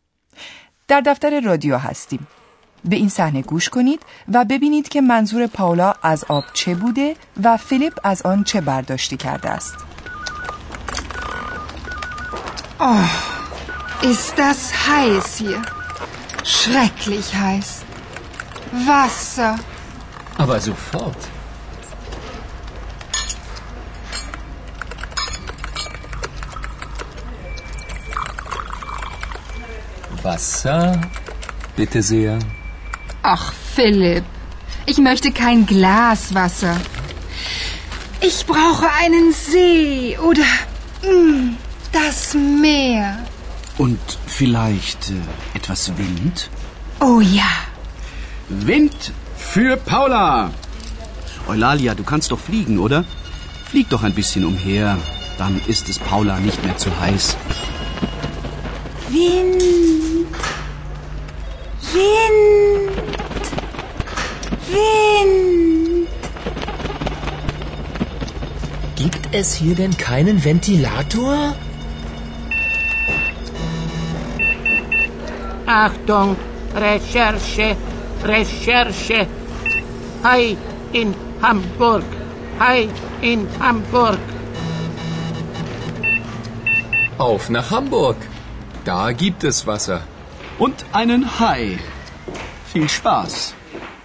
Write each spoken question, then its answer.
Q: به این صحنه گوش کنید و ببینید که منظور پاولا از آب چه بوده و فیلیپ از آن چه برداشتی کرده است.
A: فیلیپ نیز مثل هر کس دیگر از حرف پاولا چنین می فهمد که او تشنه است و یک لیوان آب می خواهد.